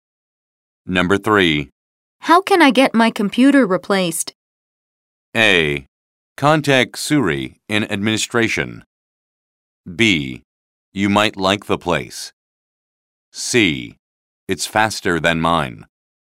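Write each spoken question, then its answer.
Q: How can I get my computer replaced?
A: A: Contact Suri in administration.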